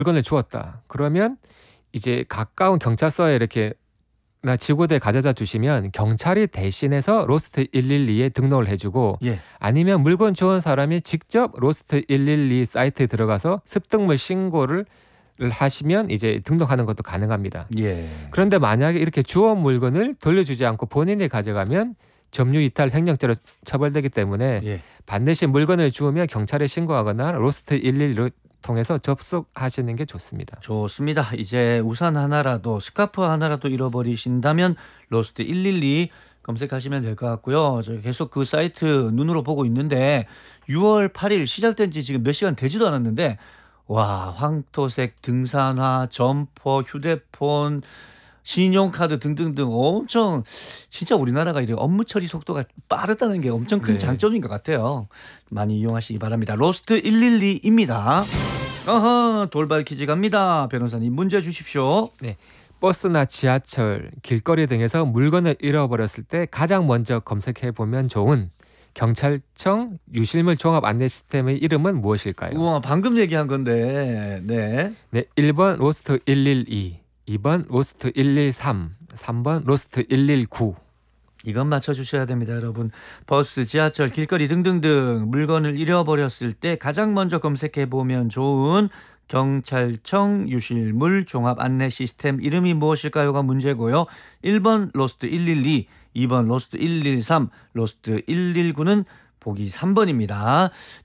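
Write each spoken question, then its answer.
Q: 버스나 지하철, 길거리 등에서 물건을 잃어버렸을 때 가장 먼저 검색해 보면 좋은 경찰청 유실물 종합 안내 시스템의 이름은 무엇일까요?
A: 1: 로스트 112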